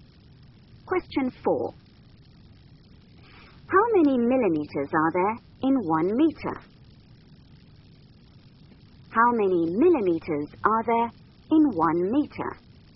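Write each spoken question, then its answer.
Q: How many millimeters are there in 1 meter?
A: 1,000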